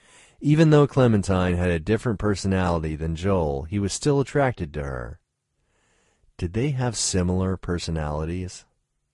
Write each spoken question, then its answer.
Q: Did they have similar personalities?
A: No, they had different personalities.